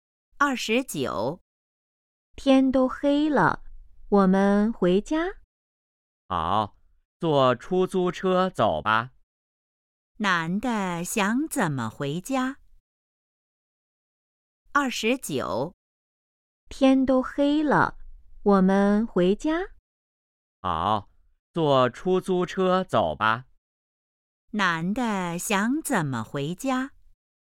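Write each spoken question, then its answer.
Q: 男的想怎么回家?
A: 坐出租车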